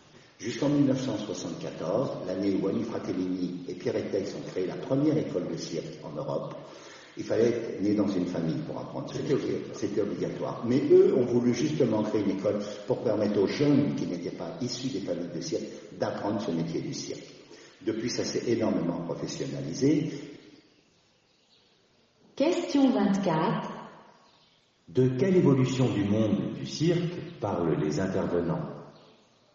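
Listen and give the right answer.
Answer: Depuis 1974, on peut apprendre le métier du cirque dans une école sans être né dans une famille du cirque ; le métier s'est professionnalisé.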